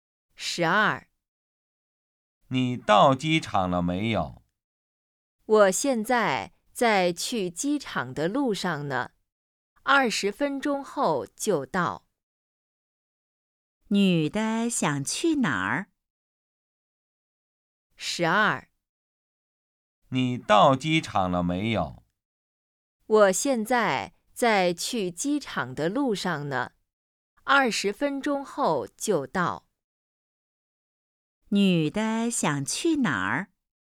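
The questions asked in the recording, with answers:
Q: 女的想去哪儿?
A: 机场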